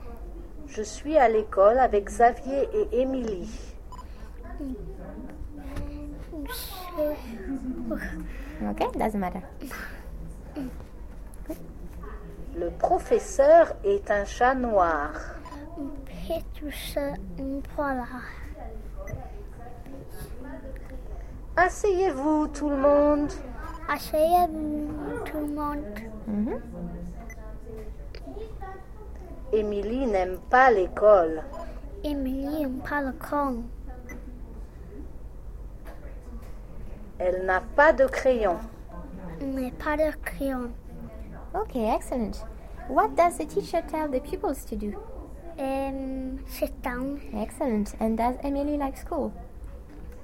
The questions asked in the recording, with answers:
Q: And does Emily like school?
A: No? No, she doesn't.